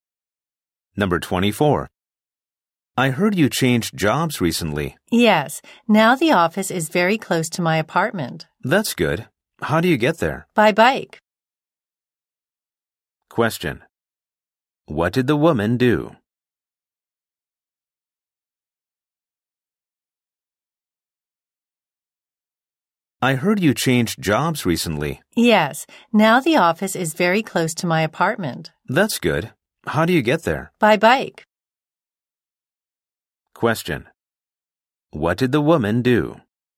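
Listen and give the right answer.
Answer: She changed jobs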